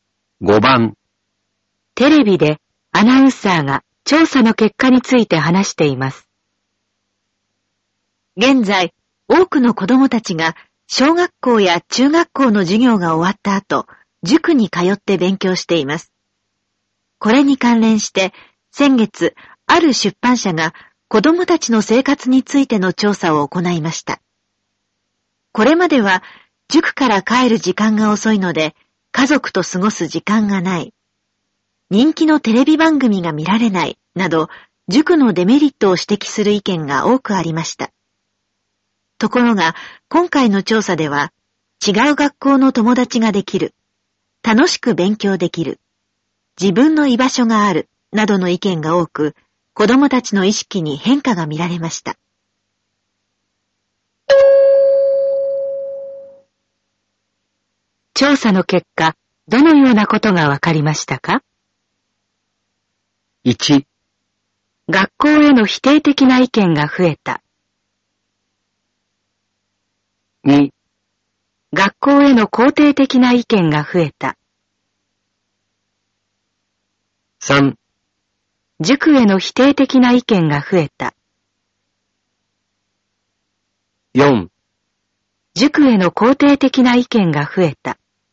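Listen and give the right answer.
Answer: 4: 塾への肯定的な意見が増えた。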